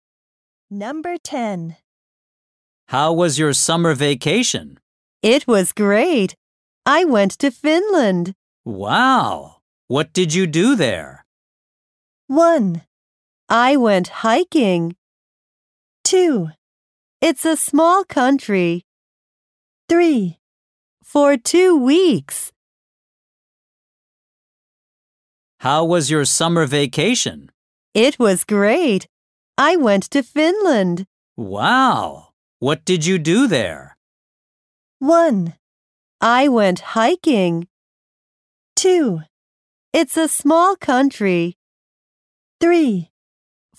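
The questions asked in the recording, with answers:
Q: Wow. What did you do there?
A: 1: I went hiking.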